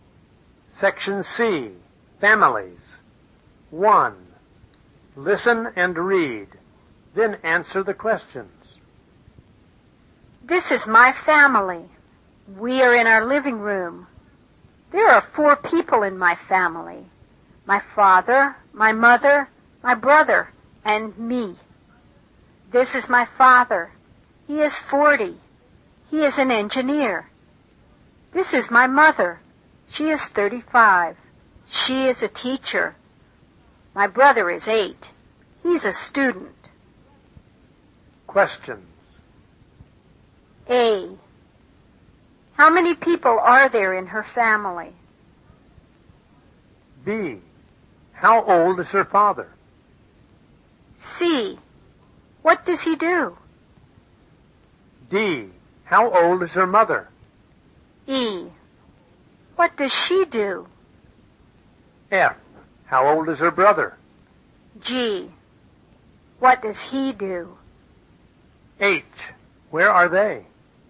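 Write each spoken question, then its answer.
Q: How many people are there in her family?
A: Four

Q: How old is her father?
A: 40

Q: What does he do?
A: He is an engineer

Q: How old is her mother?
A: 35

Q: What does she do?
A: She is a teacher

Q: What does he do?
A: He's a student

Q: Where are they?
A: In their living room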